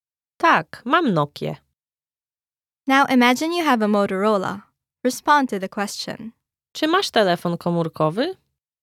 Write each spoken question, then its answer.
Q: Czy masz telefon komórkowy?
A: Tak, mam Motorola.